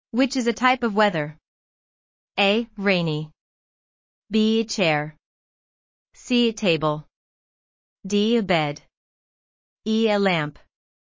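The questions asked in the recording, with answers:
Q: Which is a type of weather?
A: A: Rainy.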